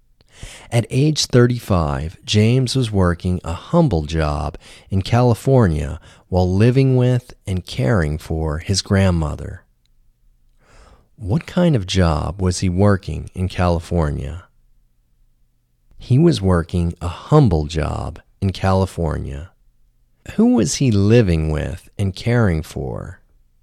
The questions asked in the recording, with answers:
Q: Who was he living with and caring for?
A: He was living with and caring for his grandmother.